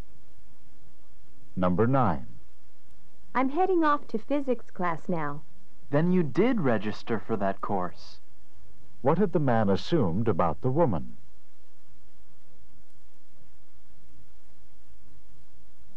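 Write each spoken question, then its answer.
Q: What had the man assumed about the woman?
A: That she hadn't registered for the course.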